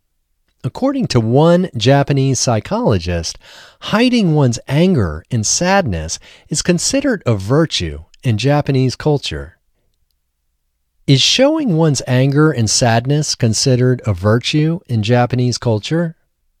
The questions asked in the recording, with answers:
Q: Is showing one's anger and sadness considered a virtue in Japanese culture?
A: No, showing one's anger and sadness is not considered a virtue in Japanese culture.